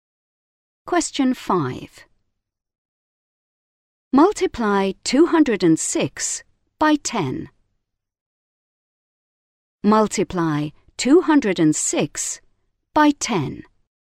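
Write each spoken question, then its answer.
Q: Multiply 206 by 10.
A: 2060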